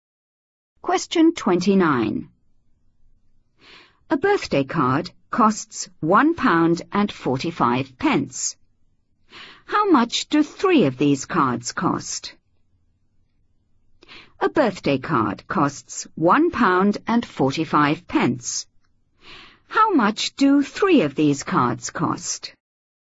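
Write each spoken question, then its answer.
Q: How much do 3 of these cards cost?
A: £4.35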